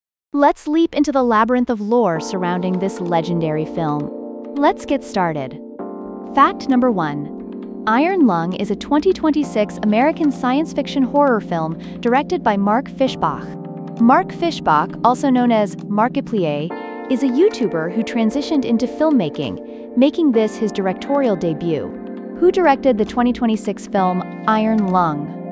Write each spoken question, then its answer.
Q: Who directed the 2026 film Iron Lung?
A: Correct answer, Mark Fishbach.